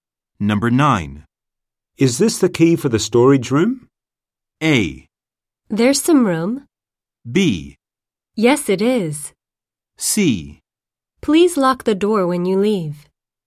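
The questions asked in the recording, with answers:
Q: Is this the key for the storage room?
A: B: Yes, it is.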